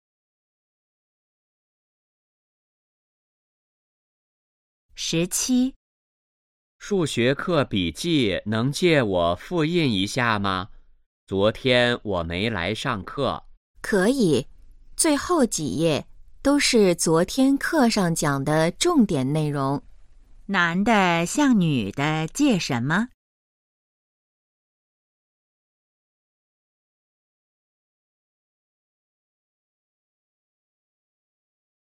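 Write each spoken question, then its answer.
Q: 男的向女的借什么?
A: 数学课笔记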